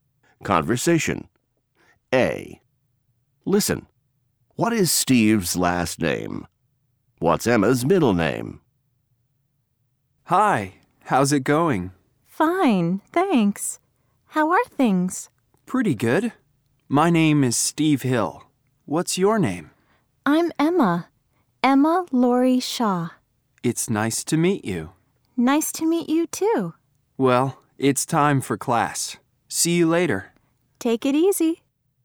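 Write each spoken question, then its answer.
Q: What is Steve's last name?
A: Hill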